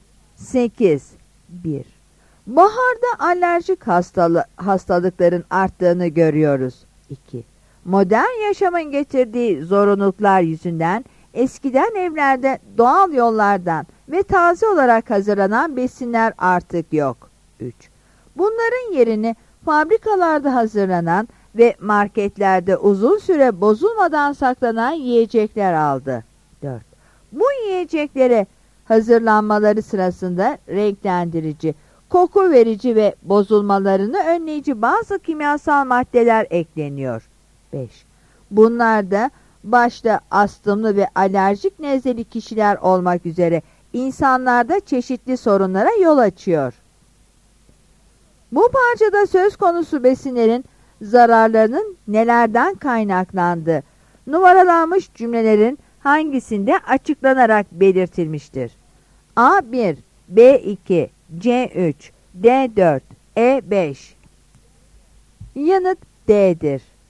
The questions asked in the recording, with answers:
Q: Bu parçada söz konusu besinlerin zararlarının nelerden kaynaklandığı, numaralanmış cümlelerin hangisinde açıklanarak belirtilmiştir.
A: Yanıt D'dir.